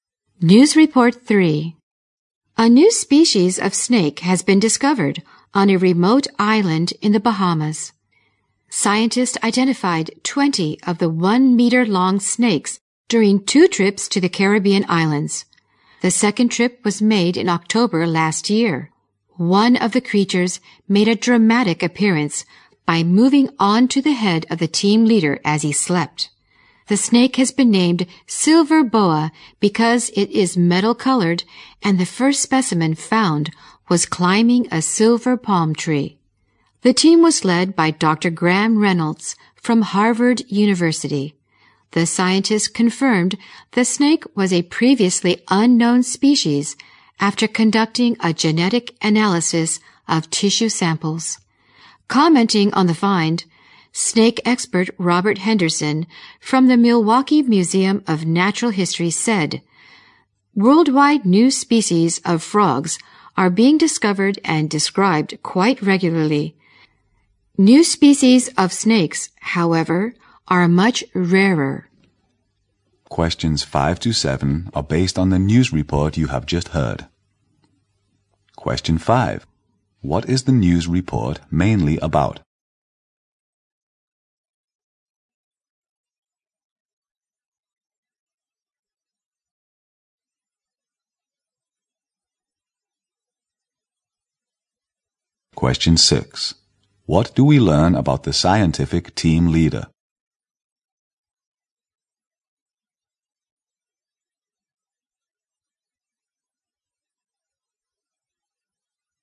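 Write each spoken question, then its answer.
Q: What is the news report mainly about?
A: The discovery of a new species of snake in the Bahamas

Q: What do we learn about the scientific team leader?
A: A snake moved onto his head while he slept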